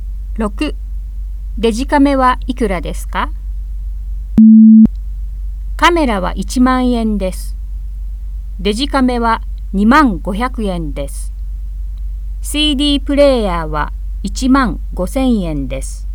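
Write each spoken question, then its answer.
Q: デジカメはいくらですか?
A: 2万500円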